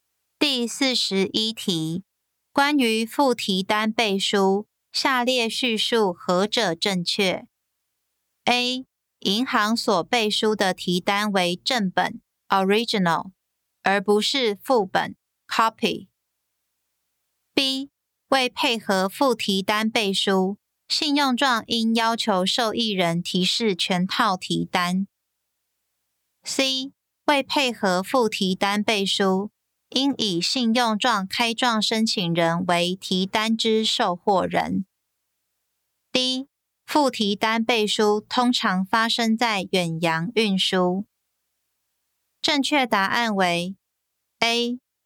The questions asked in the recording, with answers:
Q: 关于附提单背书,下列叙述何者正确 ?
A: 正确答案为 A.